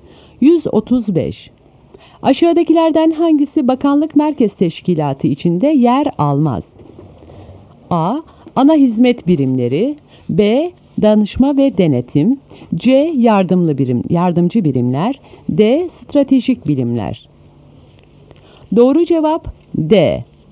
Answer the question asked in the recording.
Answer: Doğru cevap D.